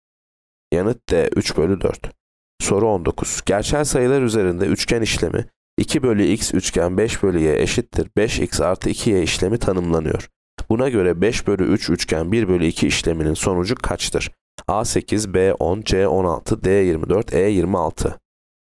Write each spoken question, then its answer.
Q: Buna göre 5 bölü 3 üçgen 1 bölü 2 işleminin sonucu kaçtır?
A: Yanıt E 26.